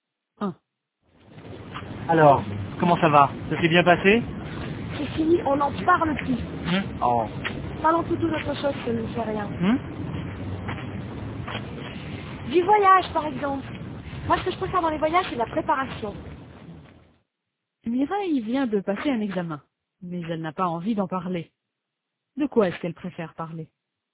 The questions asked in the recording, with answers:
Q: De quoi est-ce qu'elle préfère parler?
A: Du voyage.